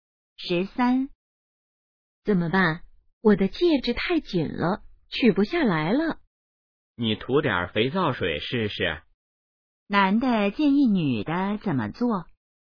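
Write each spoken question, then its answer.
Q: 男的建议女的怎么做?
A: 涂点肥皂水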